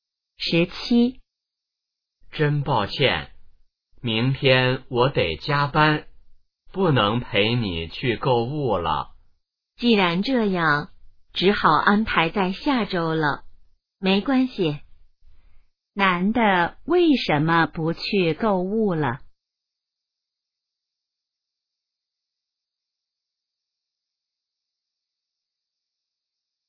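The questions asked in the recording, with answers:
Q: 男的为什么不去购物了?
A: 明天要加班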